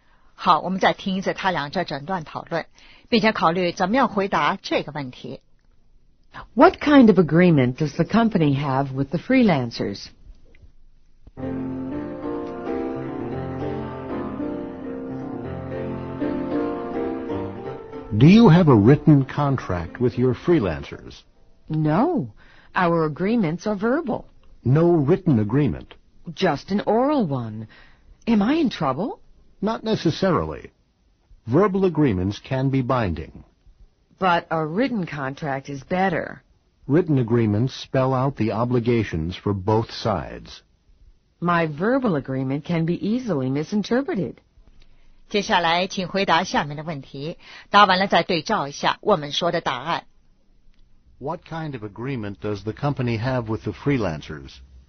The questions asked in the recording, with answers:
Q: What kind of agreement does the company have with the freelancers?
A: Verbal agreement.